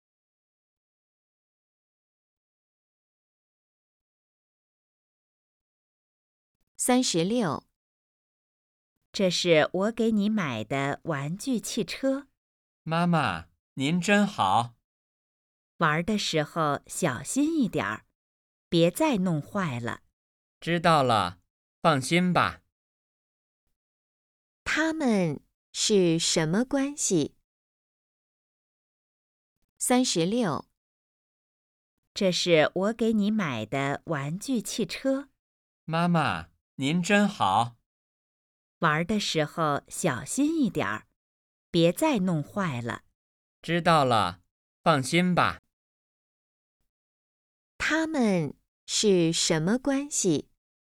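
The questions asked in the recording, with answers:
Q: 他们是什么关系?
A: 母子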